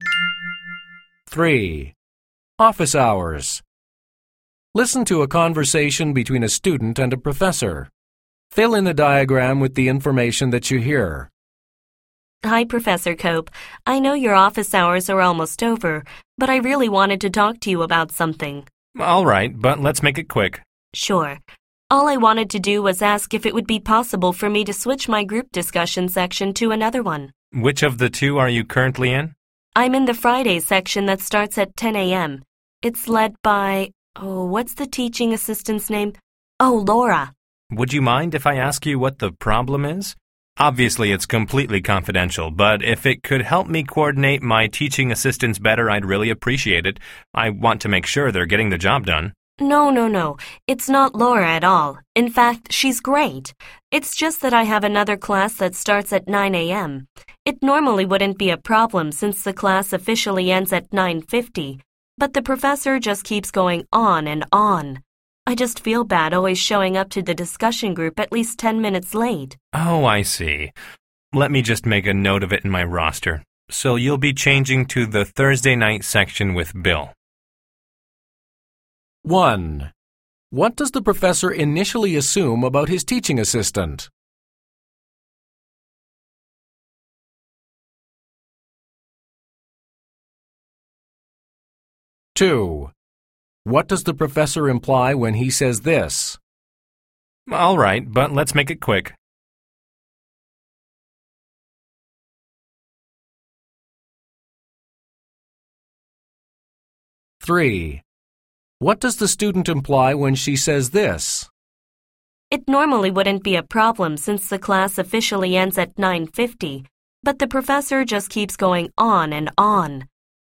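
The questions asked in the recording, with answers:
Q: What does the professor initially assume about his teaching assistant?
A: That the student is switching because of a problem with the teaching assistant, Laura, maybe not doing her job well

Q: What does the professor imply when he says this?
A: He doesn't have much time because his office hours are almost over

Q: What does the student imply when she says this?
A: Her 9 a.m. class usually runs late, so she arrives late to the discussion group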